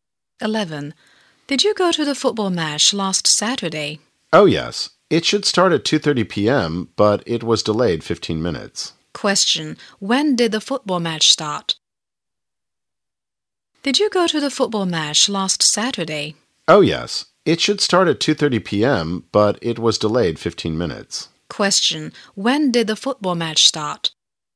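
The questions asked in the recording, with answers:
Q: When did the football match start?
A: At 2:45 p.m.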